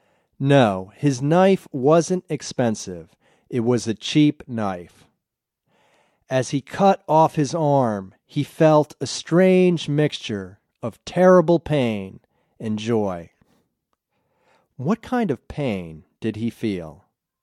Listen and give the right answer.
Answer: He felt a strange mixture of terrible pain and joy.